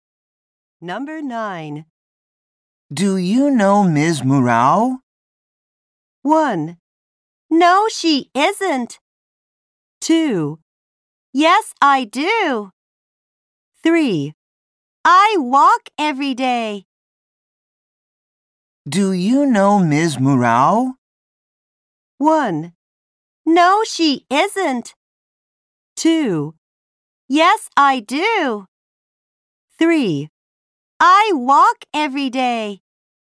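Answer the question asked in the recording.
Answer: 2: Yes, I do.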